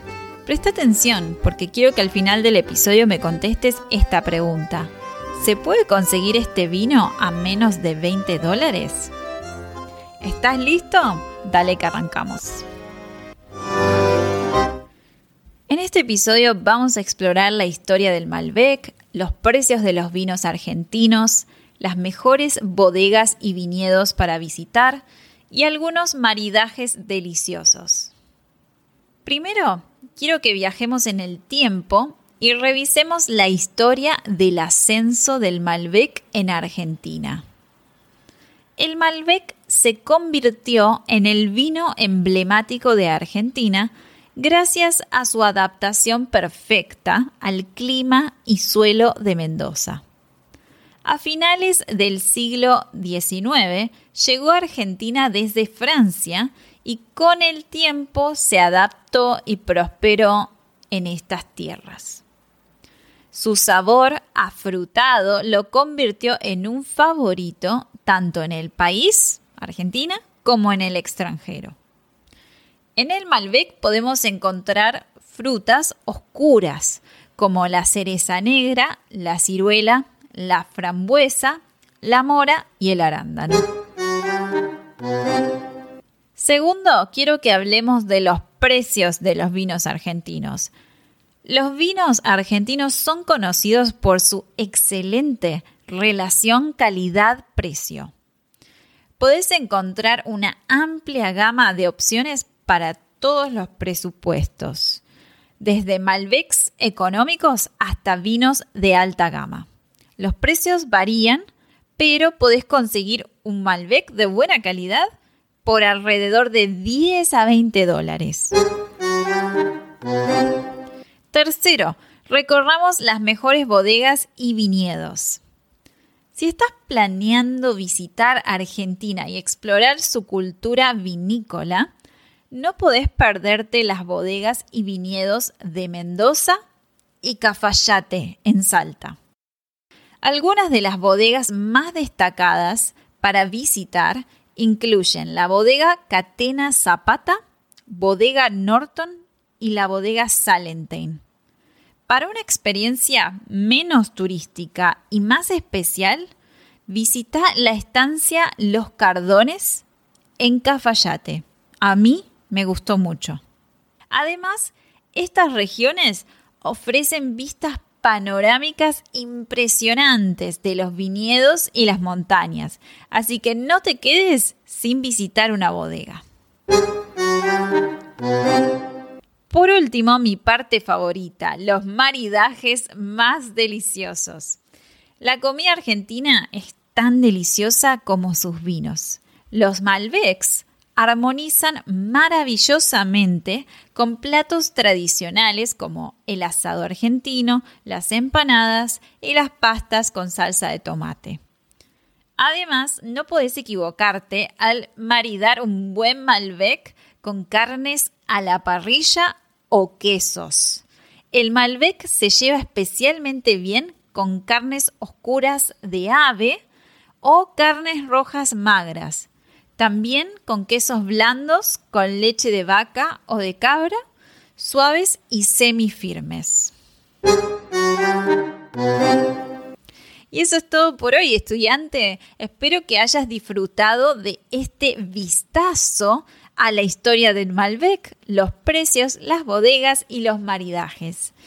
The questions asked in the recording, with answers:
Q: ¿Se puede conseguir este vino a menos de 20 dólares?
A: Recordá entonces que podés encontrar un buen Malbec de calidad por menos de 20 dólares.